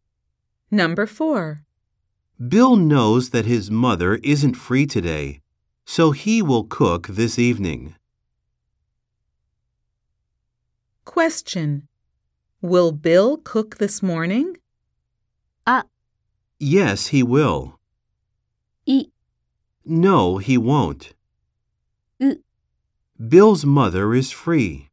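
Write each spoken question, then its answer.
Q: Will Bill cook this morning?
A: B: No, he won't.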